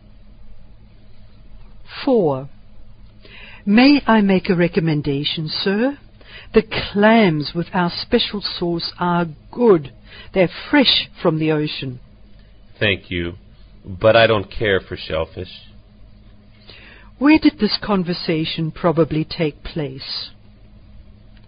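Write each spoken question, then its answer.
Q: Where did this conversation probably take place?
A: In a restaurant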